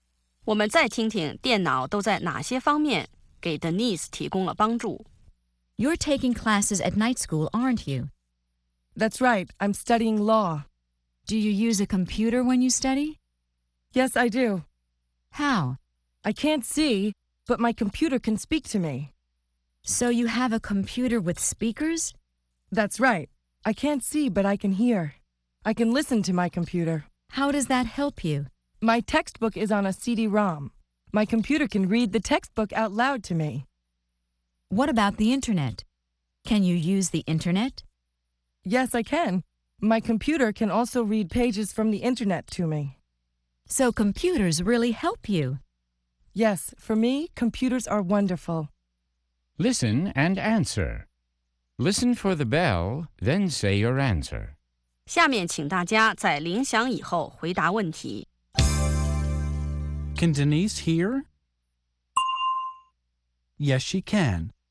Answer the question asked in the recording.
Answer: Yes, she can.